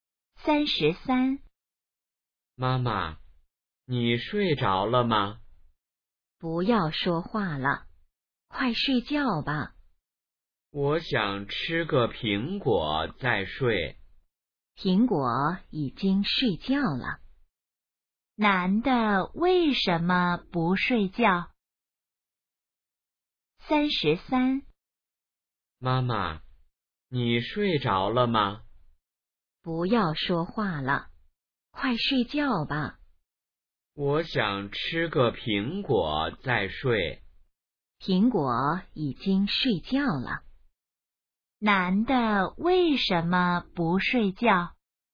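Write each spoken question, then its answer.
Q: 男的为什么不睡觉?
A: 想吃个苹果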